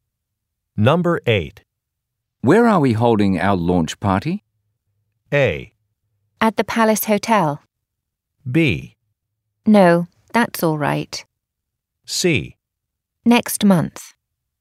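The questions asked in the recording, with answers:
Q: Where are we holding our launch party?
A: A: At the Palace Hotel.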